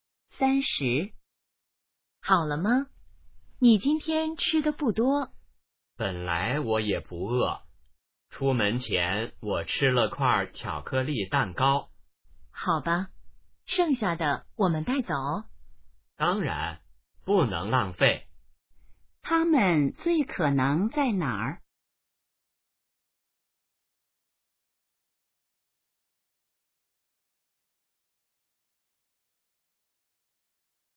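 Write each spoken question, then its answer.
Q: 他们最可能在哪儿?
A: 饭馆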